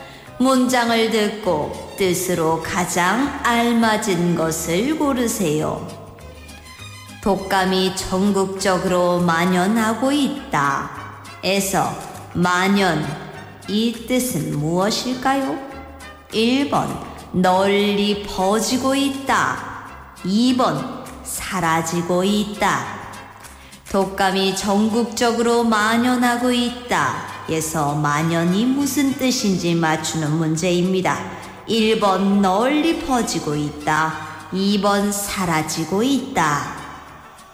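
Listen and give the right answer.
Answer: 1: 널리 퍼지고 있다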